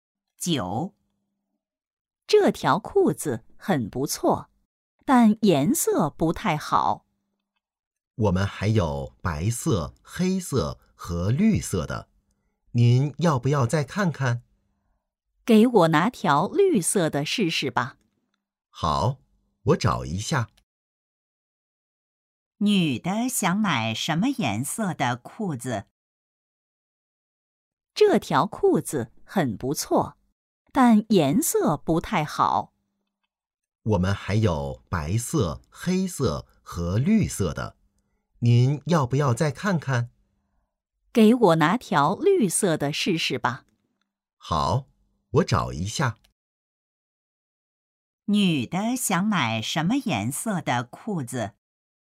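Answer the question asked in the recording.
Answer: 绿色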